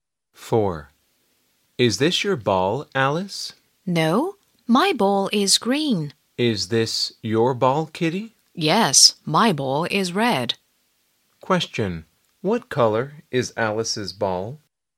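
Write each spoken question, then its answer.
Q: What color is Alice's ball?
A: green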